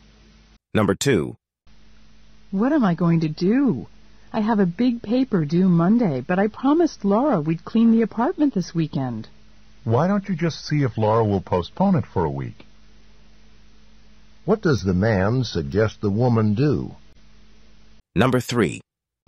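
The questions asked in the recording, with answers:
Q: What does the man suggest the woman do?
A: Ask Laura to postpone cleaning the apartment for a week.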